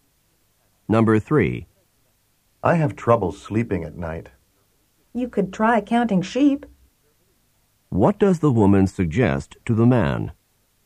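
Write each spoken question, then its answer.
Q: What does the woman suggest to the man?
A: Try counting sheep to fall asleep.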